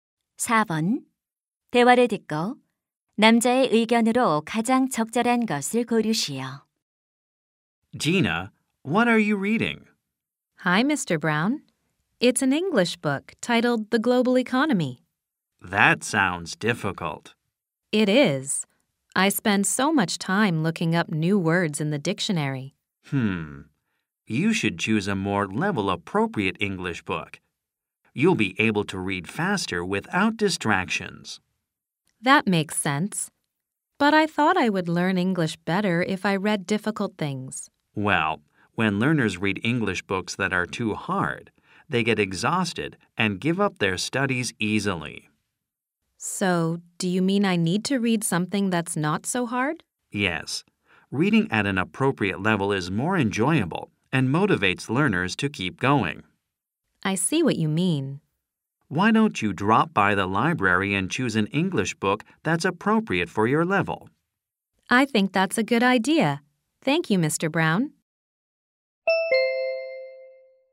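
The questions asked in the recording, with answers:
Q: 대화를 듣고 남자의 의견으로 가장 적절한 것을 고르시오.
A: 자신의 수준에 맞는 영어책을 읽어야 한다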